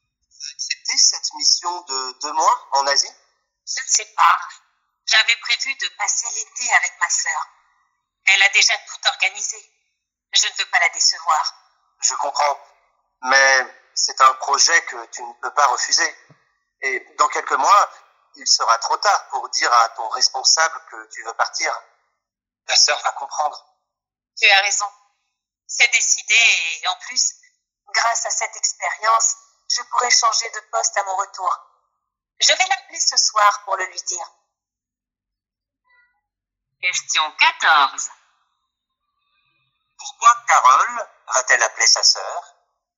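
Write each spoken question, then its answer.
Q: Pourquoi Carole va-t-elle appeler sa sœur ?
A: Pour lui dire qu'elle part en mission de 2 mois en Asie cet été (et ne passera donc pas l'été avec elle).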